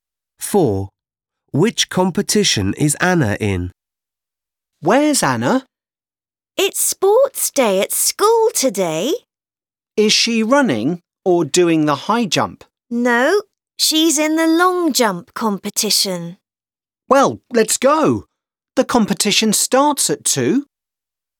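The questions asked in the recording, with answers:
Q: Which competition is Anna in?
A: the long jump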